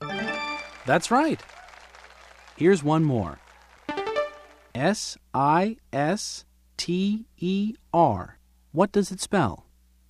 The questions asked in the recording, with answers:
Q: S-I-S-T-E-R. What does it spell?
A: Sister. It spells sister.